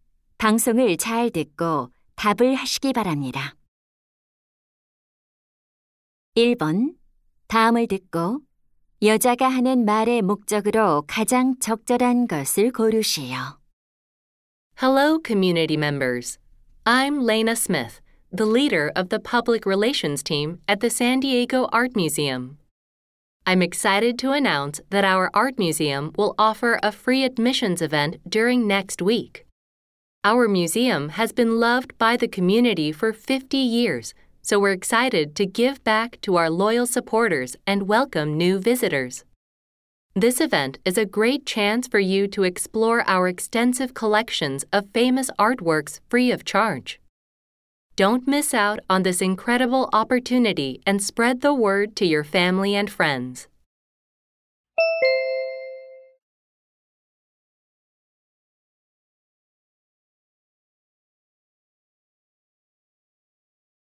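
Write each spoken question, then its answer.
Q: 다음을 듣고 여자가 하는 말의 목적으로 가장 적절한 것을 고르시오.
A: 미술관의 무료 입장 행사를 알리려고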